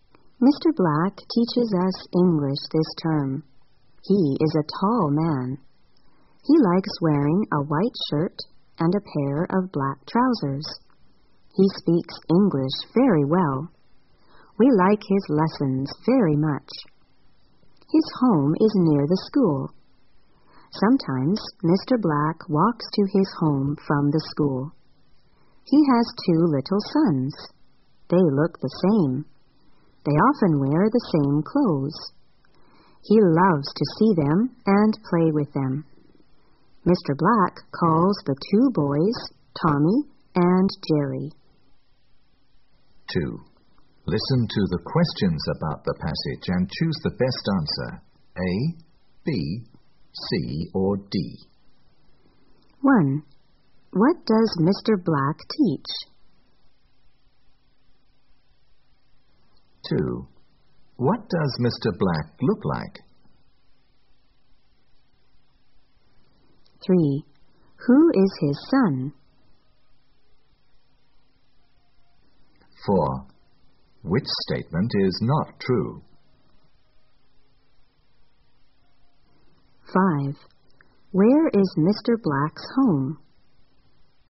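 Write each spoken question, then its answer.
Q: What does Mr. Black teach?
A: English

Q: What does Mr. Black look like?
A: He is a tall man who likes wearing a white shirt and black trousers

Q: Where is Mr. Black's home?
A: Near the school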